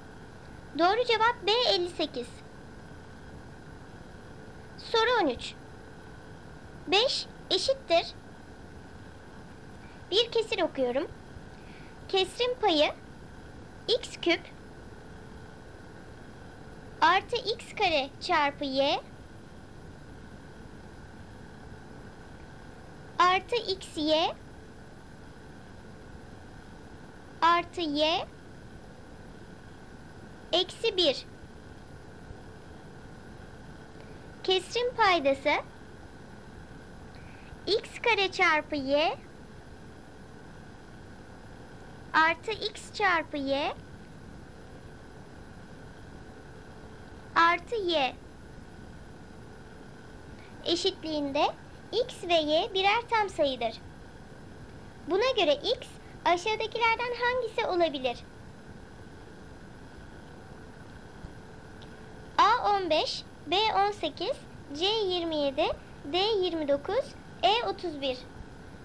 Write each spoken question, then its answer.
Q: Buna göre x aşağıdakilerden hangisi olabilir?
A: Doğru cevap D 29.